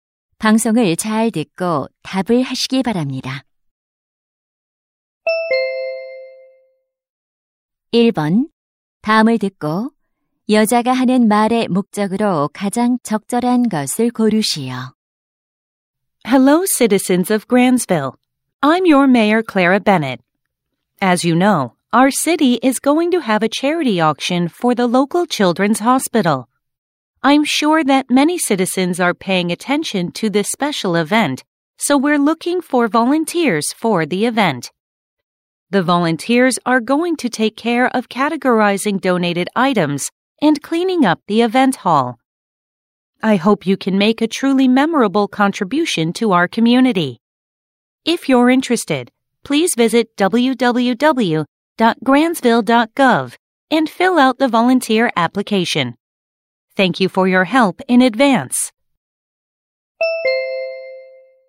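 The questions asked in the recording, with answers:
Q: 다음을 듣고 여자가 하는 말의 목적으로 가장 적절한 것을 고르시오.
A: 자선 경매 행사 자원봉사자 모집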